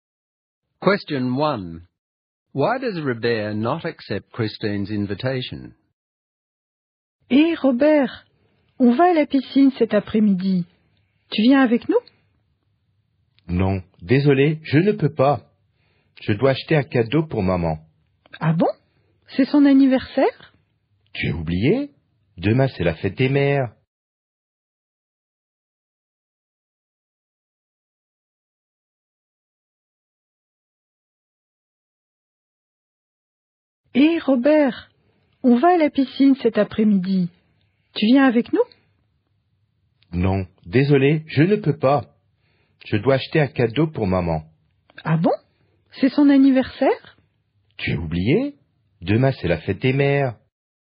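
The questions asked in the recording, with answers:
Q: Why does Robert not accept Christine's invitation?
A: He has to buy a present for his mother because tomorrow is Mother's Day.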